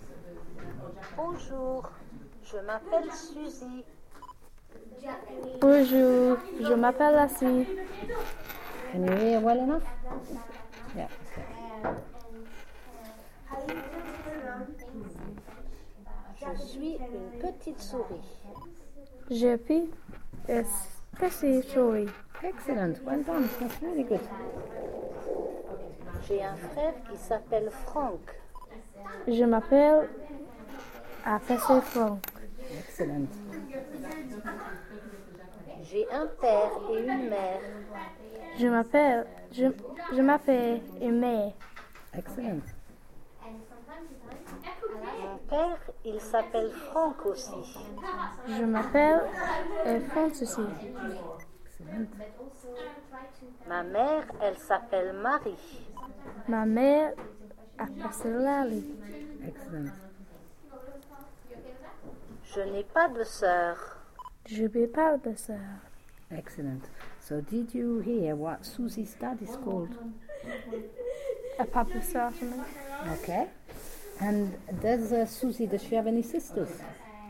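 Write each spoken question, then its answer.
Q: So did you hear what Susie's dad is called?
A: Franck

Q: And does Susie, does she have any sisters?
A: No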